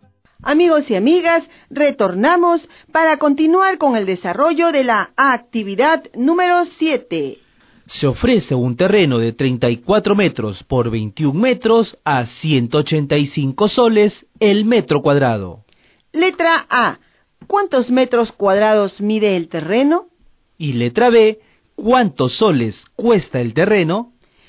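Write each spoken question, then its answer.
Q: ¿cuántos metros cuadrados mide el terreno?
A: 714 m2

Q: ¿cuántos soles cuesta el terreno?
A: 132 090 soles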